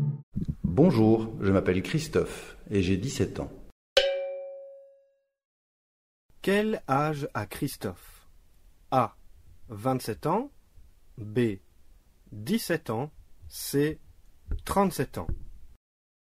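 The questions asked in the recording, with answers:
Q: Quel âge a Christophe?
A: B: 17 ans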